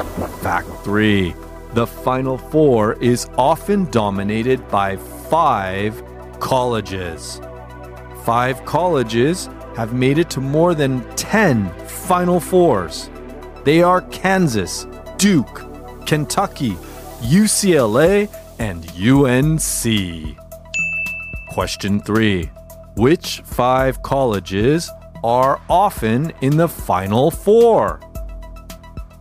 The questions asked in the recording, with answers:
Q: Which five colleges are often in the Final Four?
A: Yes, five colleges have made it to more than 10 Final Fours Kansas, Duke, Kentucky, UCLA, and UNC.